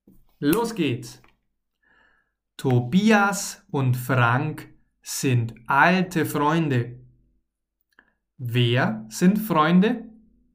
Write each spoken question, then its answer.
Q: Wer sind Freunde?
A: Tobias und Frank, sie sind Freunde.